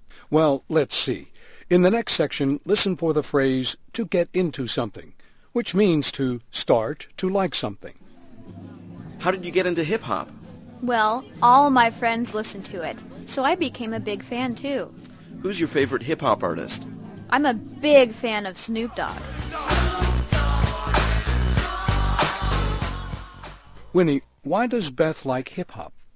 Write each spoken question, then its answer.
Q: Winnie, why does Beth like hip-hop?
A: 她说她喜欢上嘻哈乐啊,是因为她的朋友都爱听这种音乐